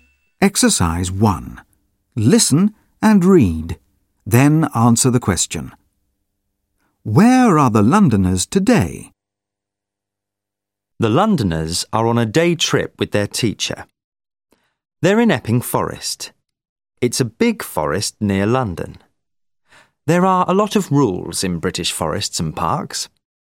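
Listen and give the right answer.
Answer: In Epping Forest, on a day trip with their teacher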